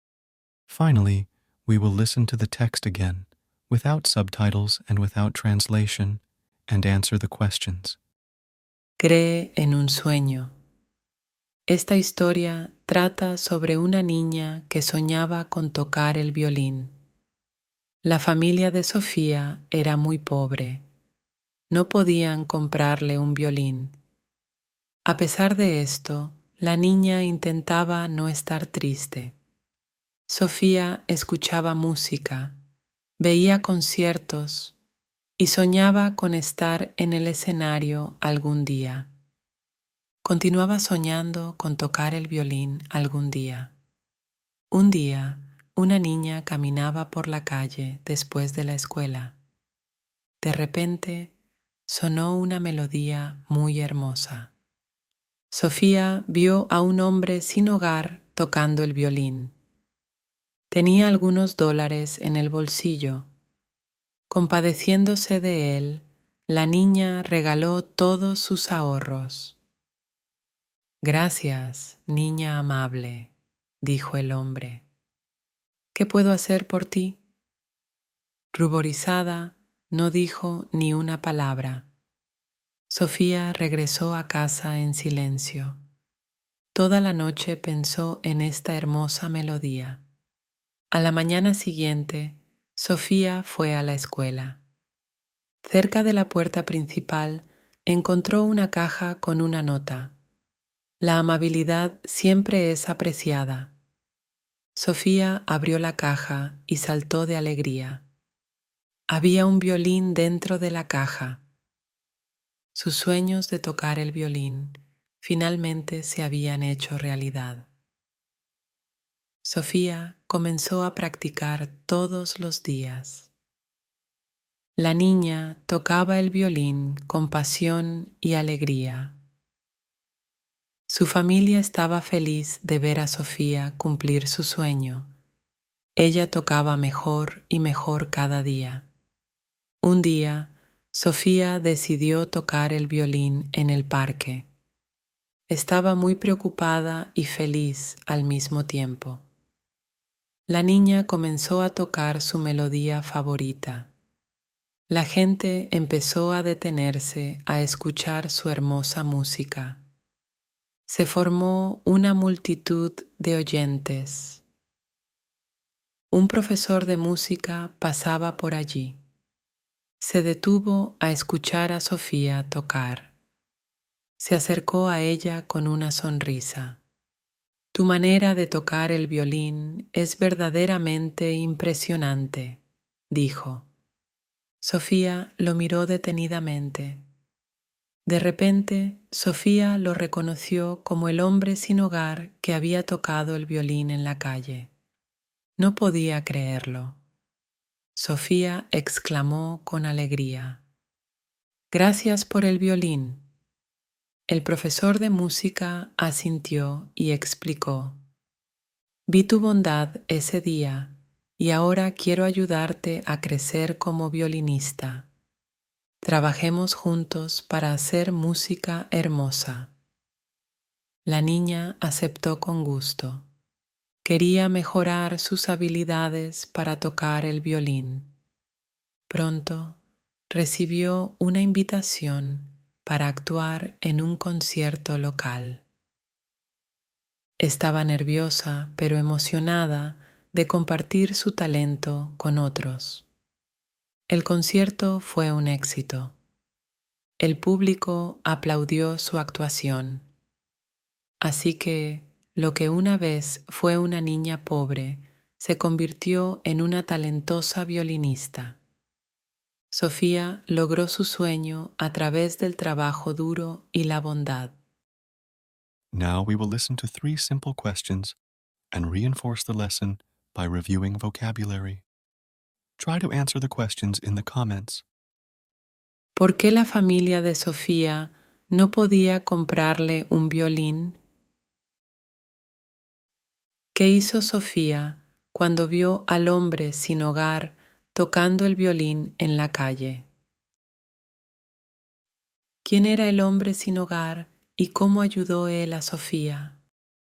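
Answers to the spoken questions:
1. Porque la familia era muy pobre.
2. Le regaló todos sus ahorros.
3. Era un profesor de música; le regaló un violín y quiso ayudarla a crecer como violinista.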